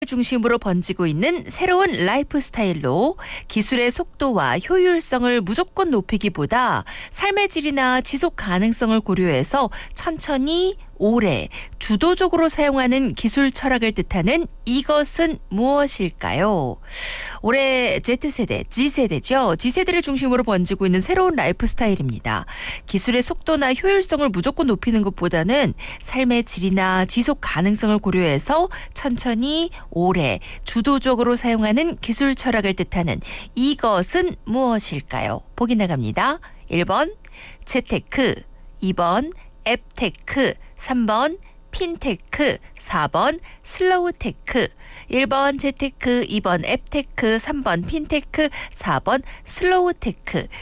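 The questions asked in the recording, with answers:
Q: 기술의 속도나 효율성을 무조건 높이는 것보다는 삶의 질이나 지속 가능성을 고려해서 천천히 오래 주도적으로 사용하는 기술 철학을 뜻하는 이것은 무엇일까요?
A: 4: 슬로우테크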